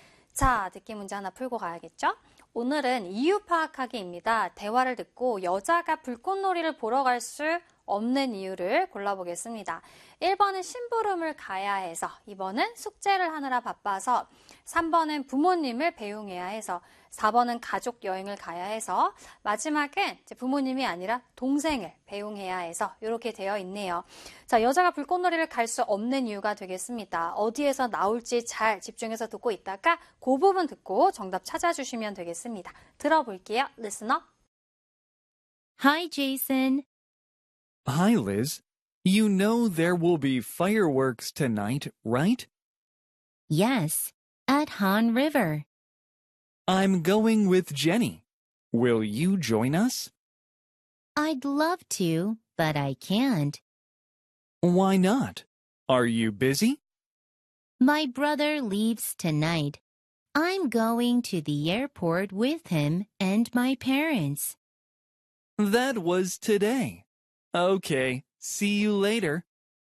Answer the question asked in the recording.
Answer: 5번에 부모님이 아니고요, 동생을 배웅하러 가야 해서가 정답이 되겠습니다.